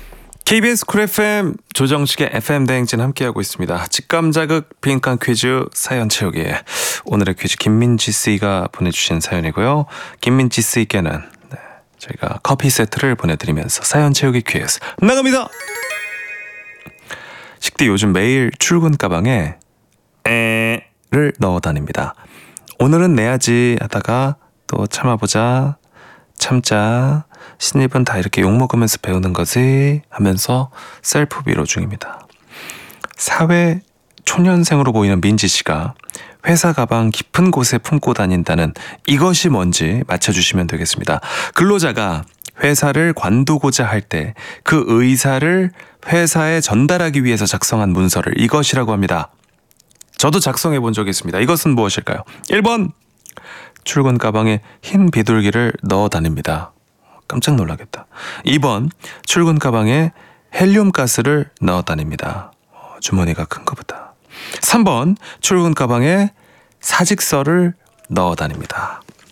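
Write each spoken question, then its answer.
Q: 이것은 무엇일까요?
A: 3: 출근 가방에 사직서를 넣어 다닙니다.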